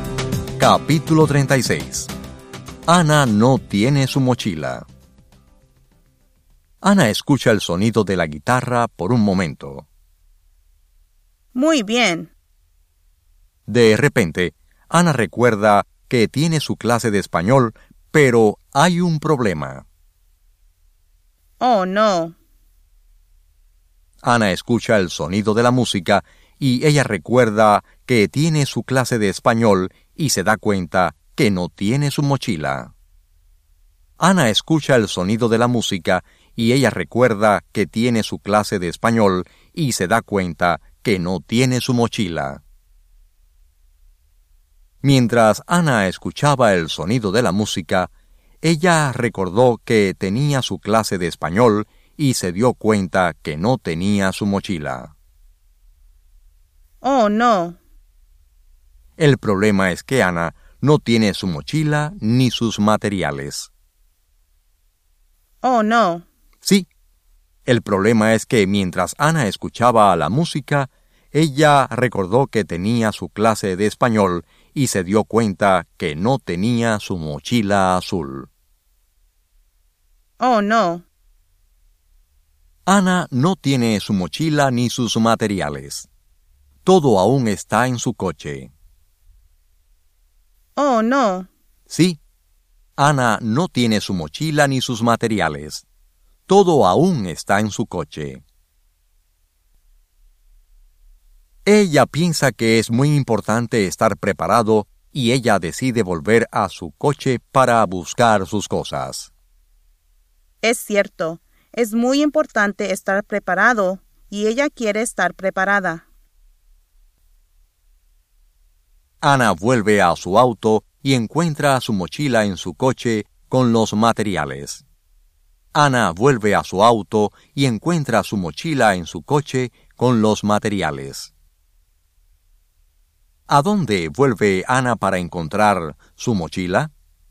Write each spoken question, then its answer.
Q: ¿A dónde vuelve Ana para encontrar su mochila?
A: Ana vuelve a su auto.